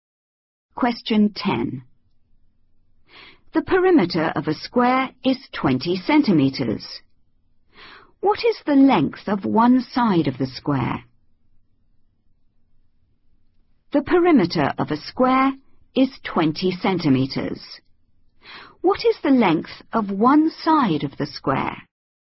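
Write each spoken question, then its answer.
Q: What is the length of one side of the square?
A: 5 cm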